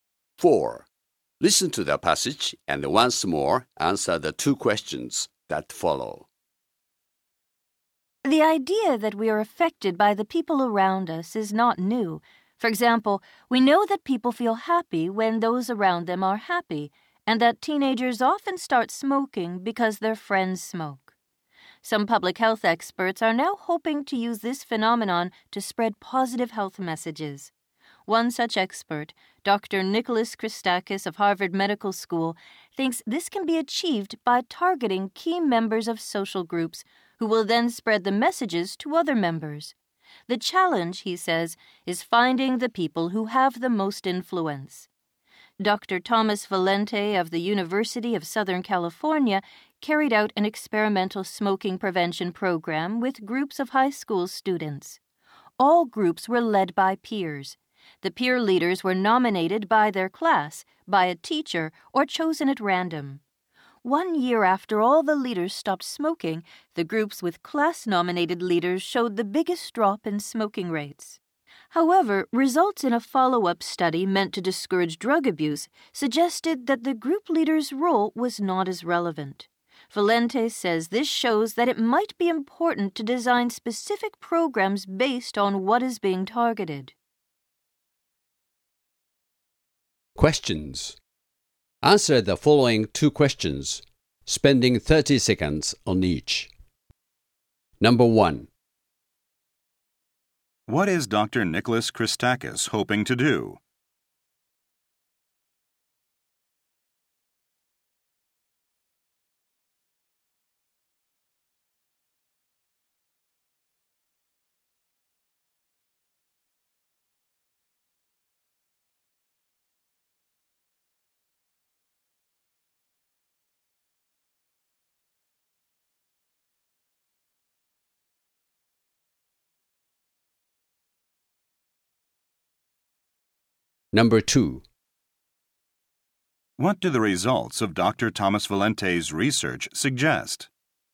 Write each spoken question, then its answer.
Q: What is Dr. Nicholas Christakis hoping to do?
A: He hopes to use the influence of key members of social groups to positively influence the followers in the group.

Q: What do the results of Dr. Thomas Valente's research suggest?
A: His research shows that the influence of peer leaders can most effectively create positive changes in the group when consideration is given to which behaviors are targeted.